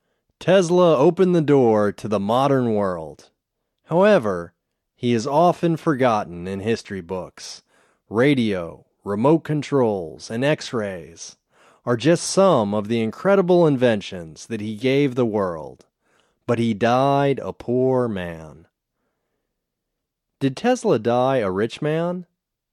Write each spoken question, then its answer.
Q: Did Tesla die a rich man?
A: No, he didn't die a rich man.